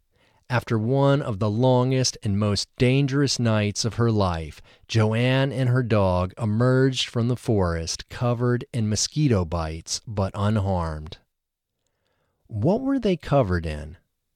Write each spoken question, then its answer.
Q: What were they covered in?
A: They were covered in mosquito bites.